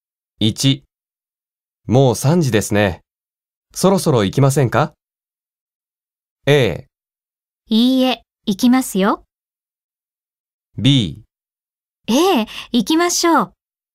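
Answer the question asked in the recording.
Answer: B: ええ、行きましょう。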